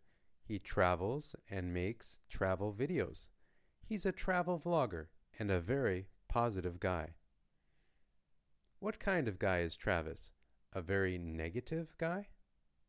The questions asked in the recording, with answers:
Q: What kind of guy is Travis?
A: He's a very positive guy.